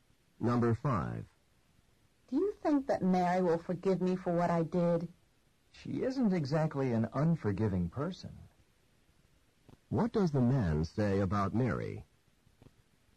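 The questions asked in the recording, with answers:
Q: What does the man say about Mary?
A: Mary will probably forgive him; she's a forgiving person.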